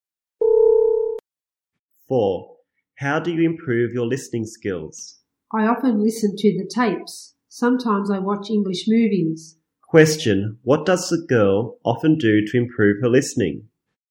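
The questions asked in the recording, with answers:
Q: What does the girl often do to improve her listening?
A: She often listens to the tapes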